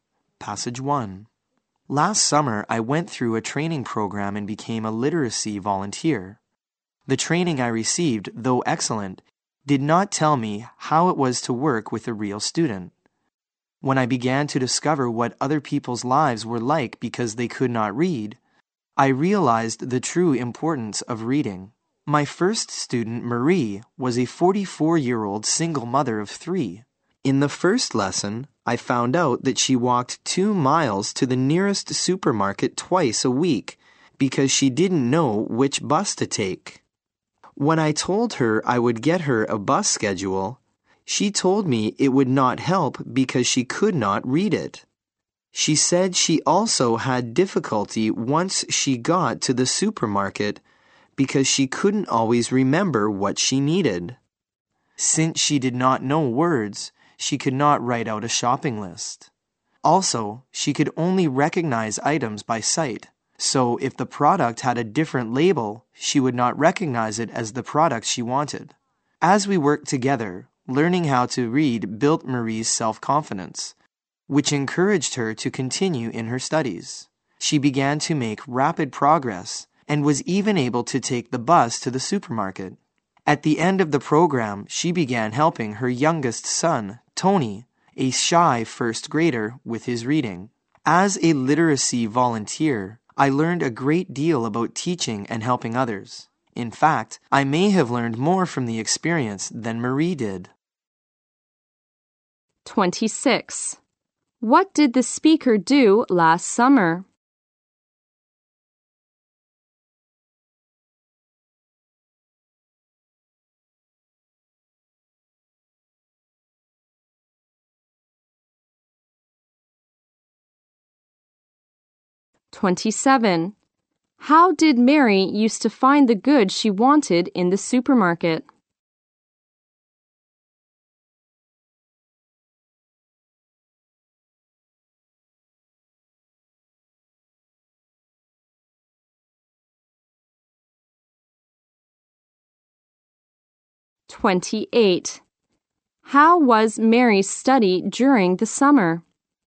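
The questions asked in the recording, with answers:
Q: What did the speaker do last summer?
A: Went through a training program and became a literacy volunteer

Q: How did Mary used to find the goods she wanted in the supermarket?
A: By recognizing items by sight

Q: How was Mary's study during the summer?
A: She made rapid progress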